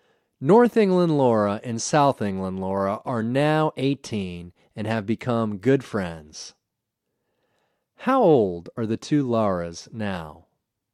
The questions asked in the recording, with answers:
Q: How old are the two Laras now?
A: The two Laras are now 18.